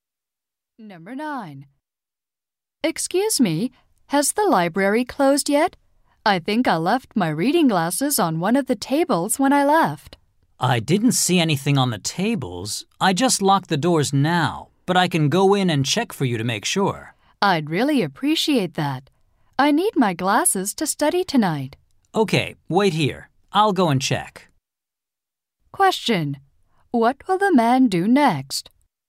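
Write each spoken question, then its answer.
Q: What will the man do next?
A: Go into the library and look for her glasses.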